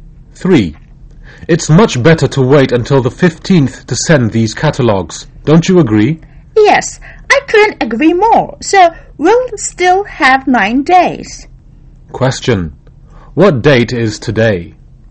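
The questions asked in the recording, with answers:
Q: What date is today?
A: The 6th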